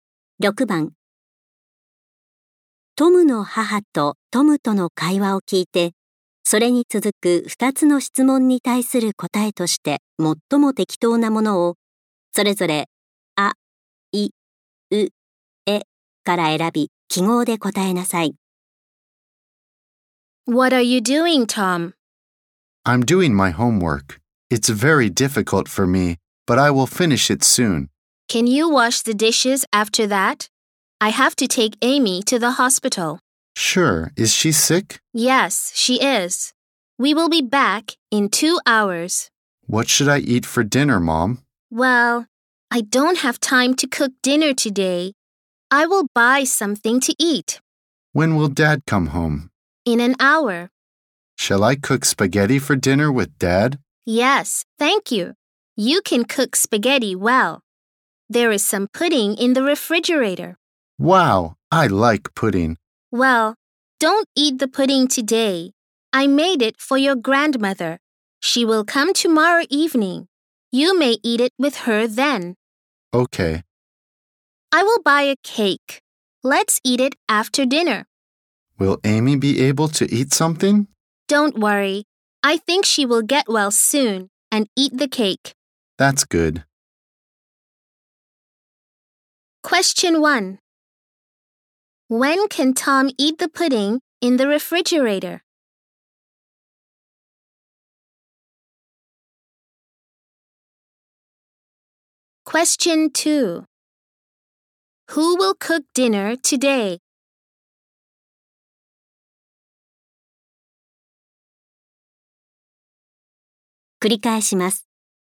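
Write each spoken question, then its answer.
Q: When can Tom eat the pudding in the refrigerator?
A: Tomorrow evening, with his grandmother

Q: Who will cook dinner today?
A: Tom and his father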